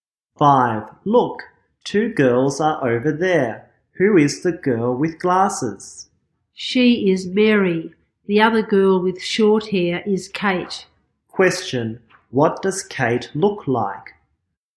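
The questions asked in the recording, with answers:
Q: Question, what does Kate look like?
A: She has short hair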